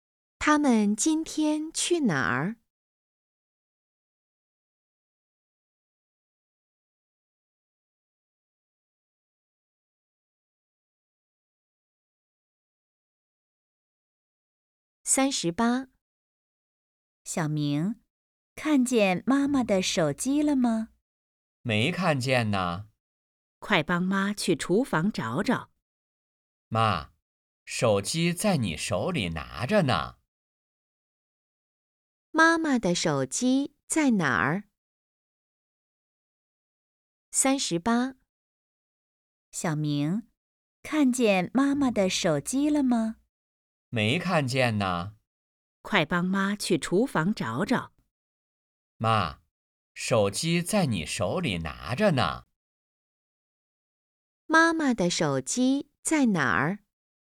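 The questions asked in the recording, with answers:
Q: 妈妈的手机在哪儿?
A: 在妈妈手里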